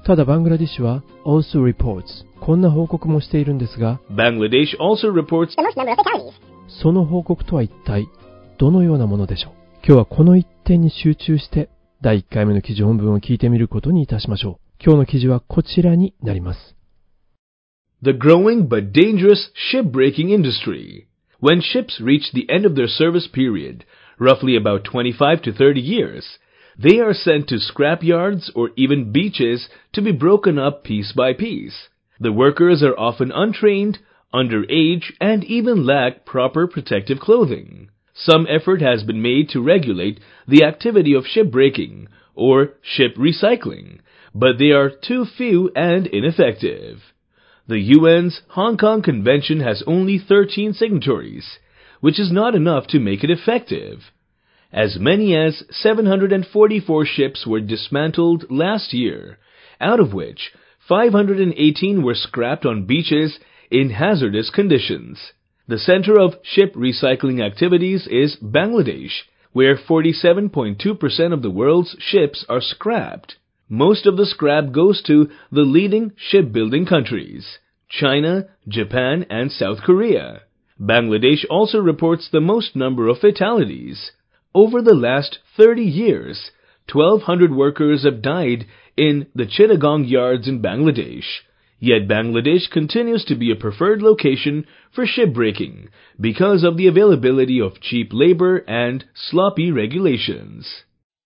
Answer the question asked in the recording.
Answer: バングラディッシュは最も多くの死亡者数を報告しているというんです。